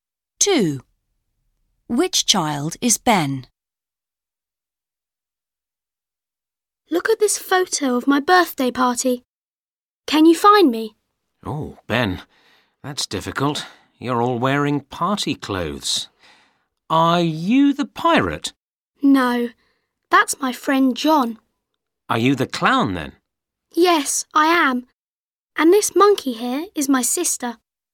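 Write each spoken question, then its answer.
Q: Which child is Ben?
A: The clown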